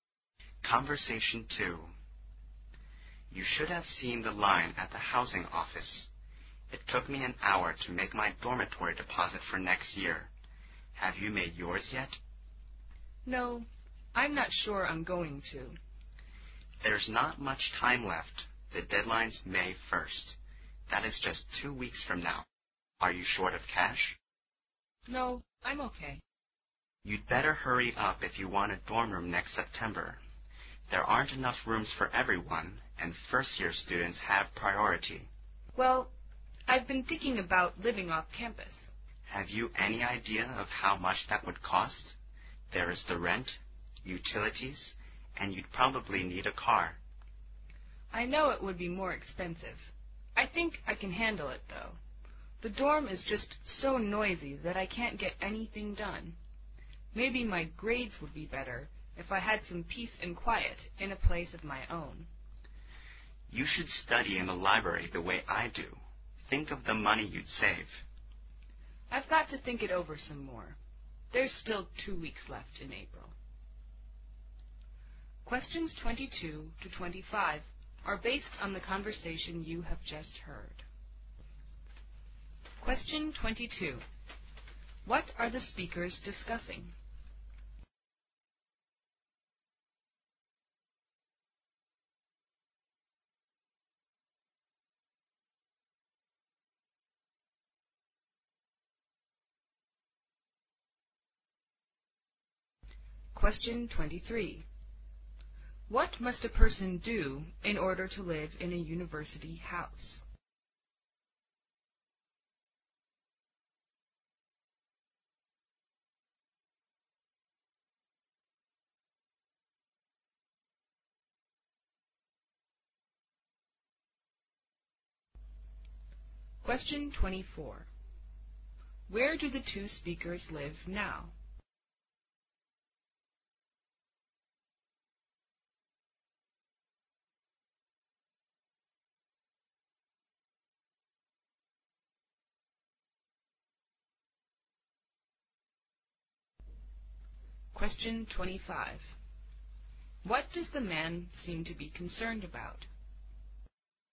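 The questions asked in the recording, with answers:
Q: What are the speakers discussing?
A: Whether to live in a dorm or off campus next year

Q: What must a person do in order to live in a university house?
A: Make a dormitory deposit by May 1st

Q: Where do the two speakers live now?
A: In a dormitory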